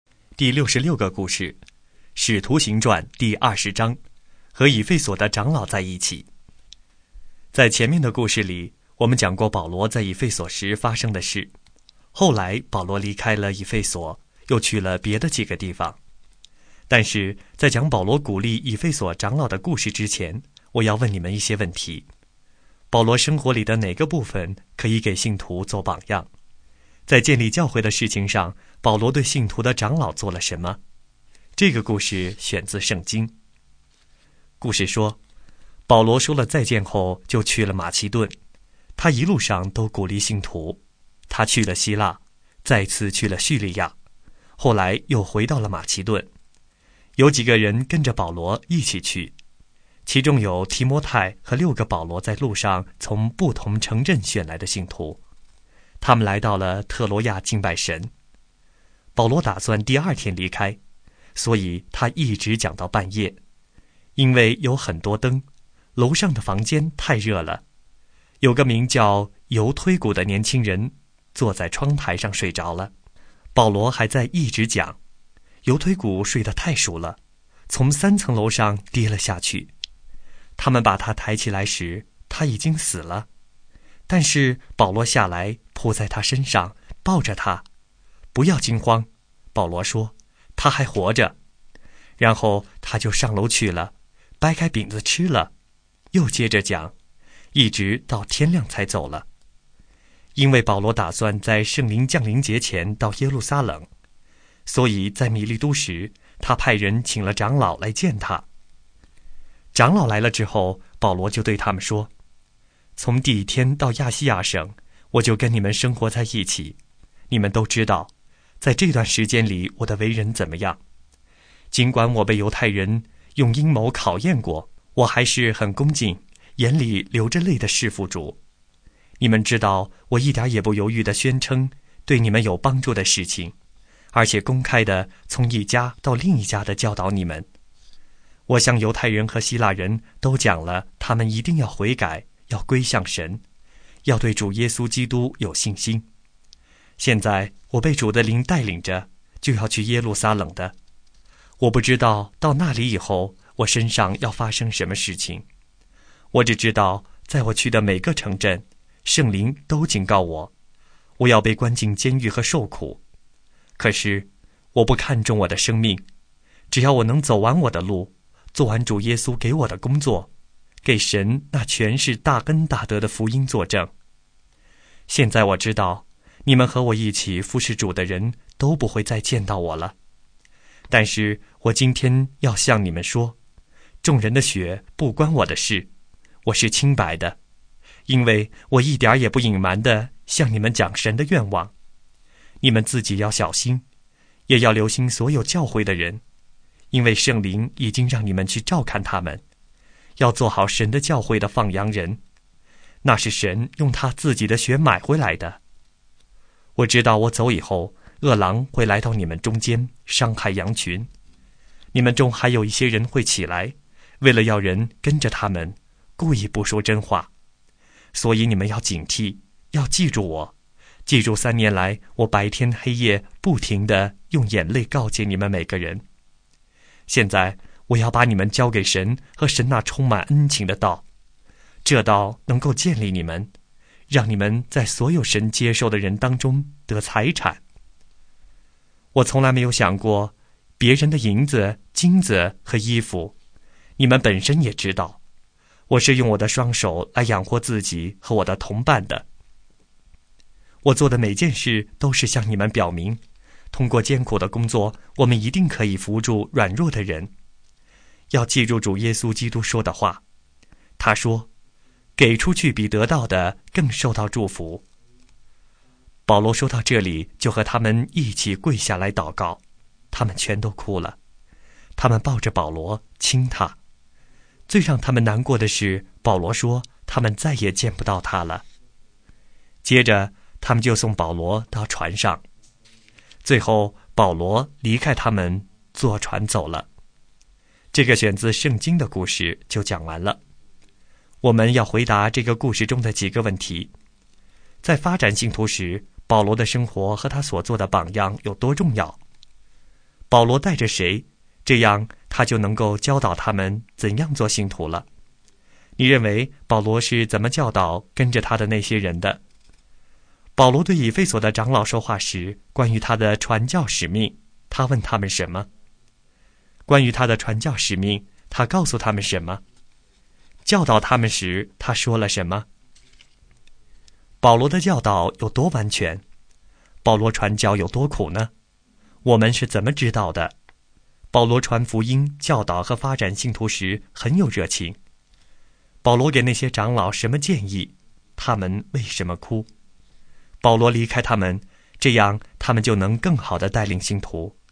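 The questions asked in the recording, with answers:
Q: 保罗带着谁,这样他就能够教导他们怎样做信徒了。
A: 提摩太和六个从不同城镇选来的信徒

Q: 保罗给那些长老什么建议?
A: 要小心自己,留心教会的人,做好神的教会的放羊人,警惕恶狼

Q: 他们为什么哭?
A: 因为保罗说他们再也见不到他了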